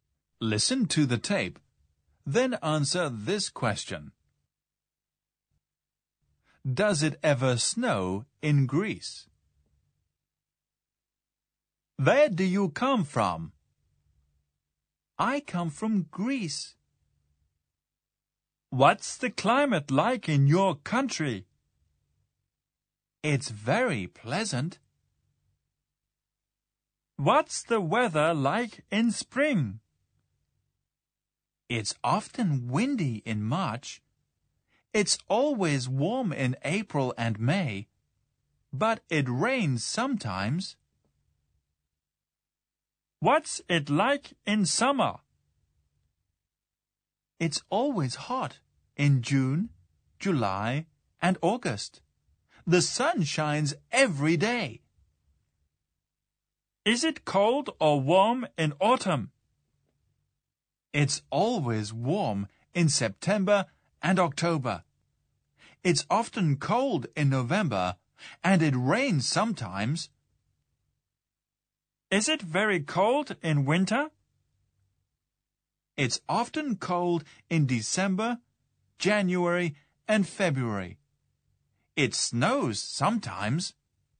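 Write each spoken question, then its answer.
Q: Does it ever snow in Greece?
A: Yes, it snows sometimes in winter.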